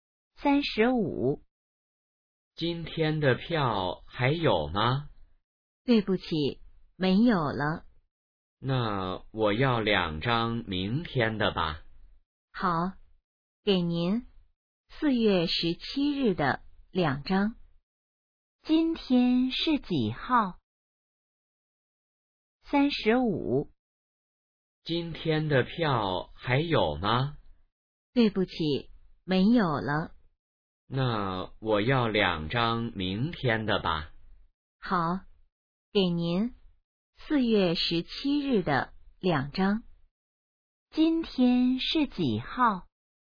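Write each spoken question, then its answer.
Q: 今天是几号?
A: 4月16日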